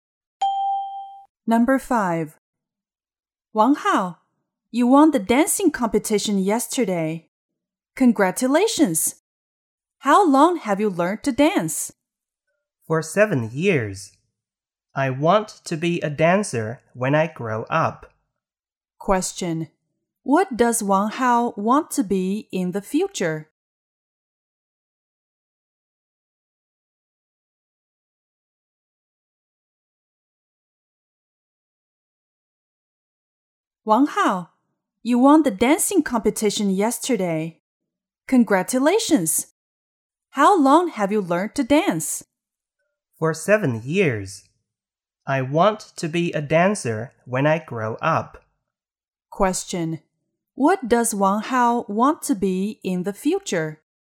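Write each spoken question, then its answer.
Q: What does Wang Hao want to be in the future?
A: A dancer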